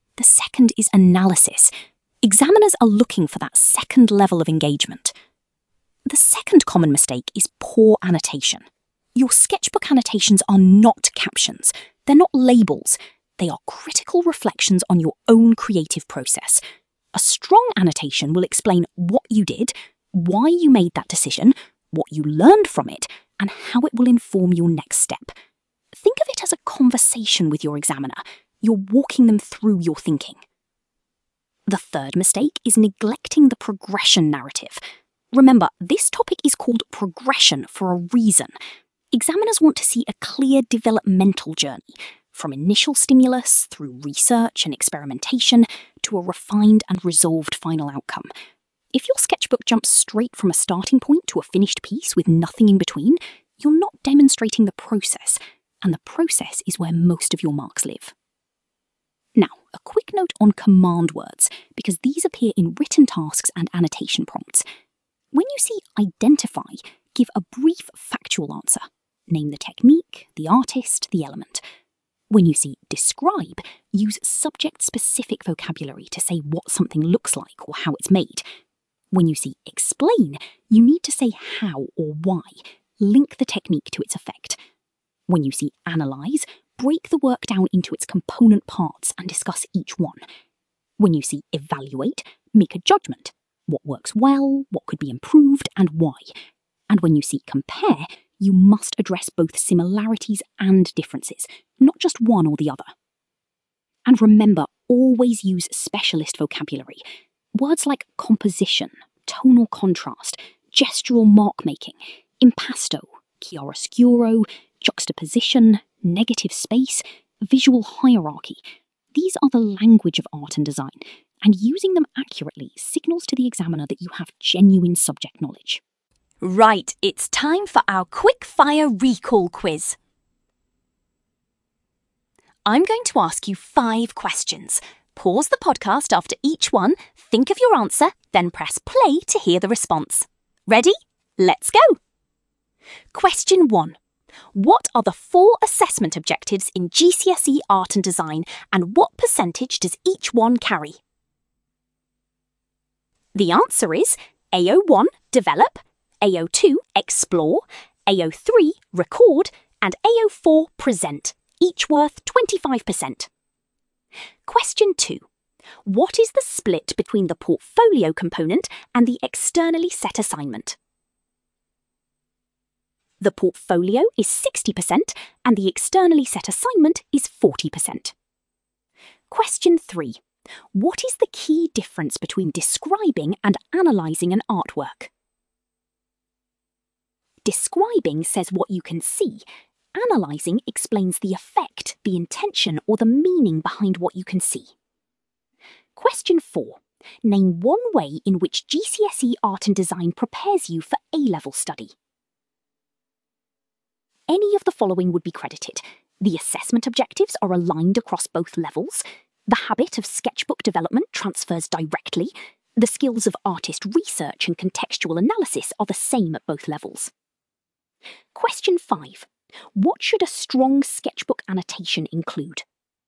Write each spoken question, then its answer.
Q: What should a strong sketchbook annotation include?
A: What you did, why you made that decision, what you learned, and how it informs your next step.